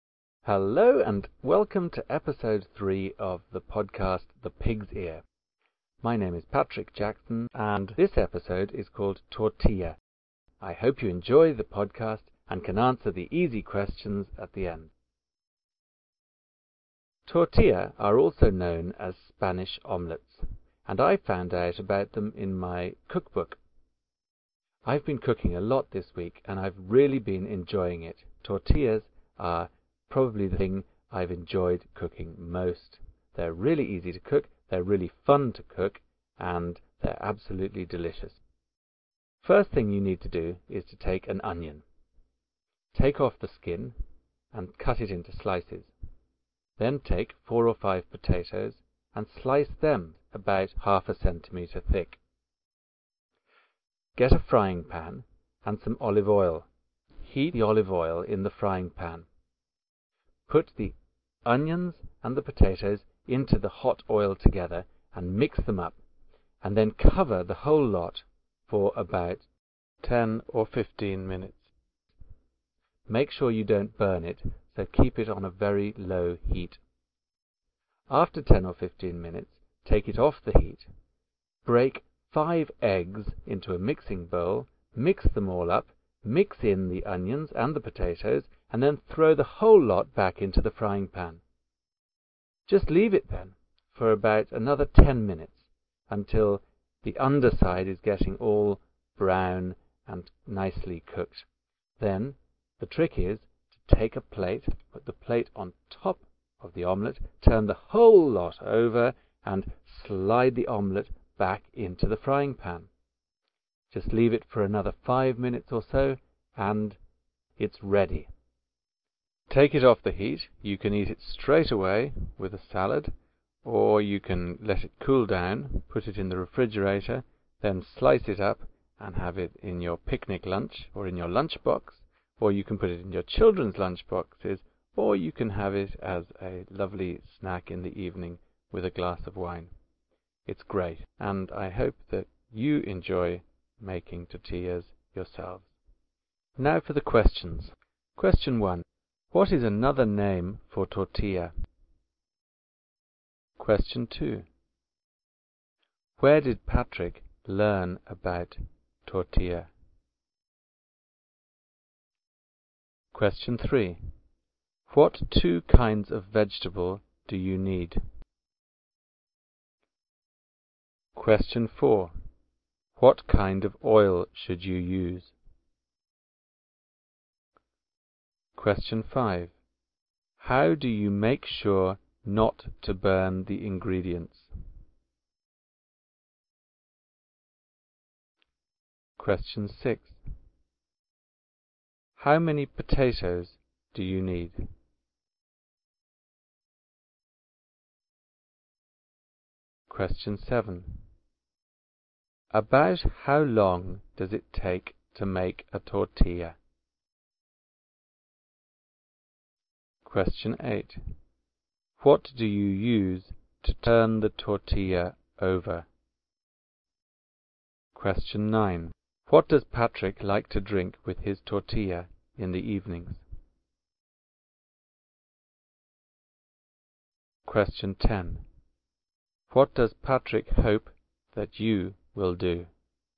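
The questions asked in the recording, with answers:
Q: What is another name for tortilla?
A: Spanish omelet

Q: Where did Patrick learn about tortilla?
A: In his cookbook

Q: What 2 kinds of vegetable do you need?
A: Onion and potatoes

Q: What kind of oil should you use?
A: Olive oil

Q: How do you make sure not to burn the ingredients?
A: Keep it on a very low heat

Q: How many potatoes do you need?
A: 4 or 5

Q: What do you use to turn the tortilla over?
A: A plate

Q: What does Patrick like to drink with his tortilla in the evenings?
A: A glass of wine

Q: What does Patrick hope that you will do?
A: Enjoy making tortillas yourself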